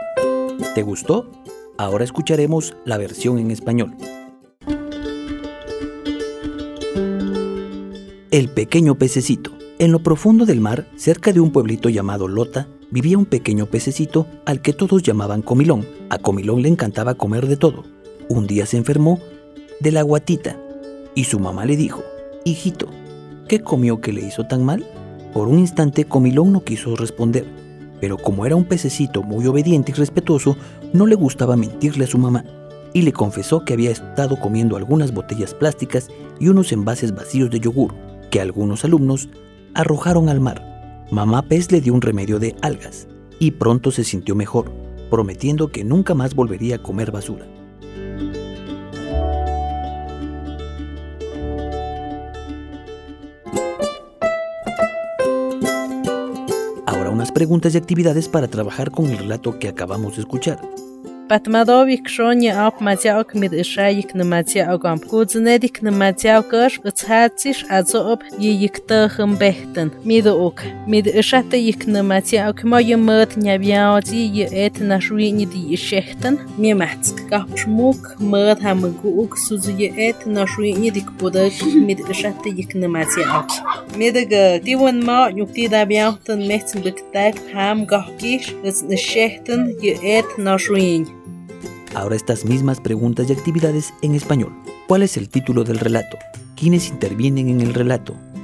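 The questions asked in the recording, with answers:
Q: ¿Cuál es el título del relato?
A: El pequeño pececito

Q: ¿Quiénes intervienen en el relato?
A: Comilón (el pequeño pececito) y su mamá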